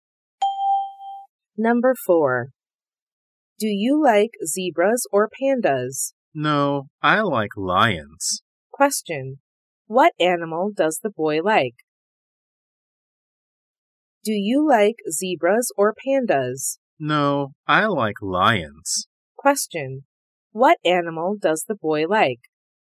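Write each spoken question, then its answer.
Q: Question, what animal does the boy like?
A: Lions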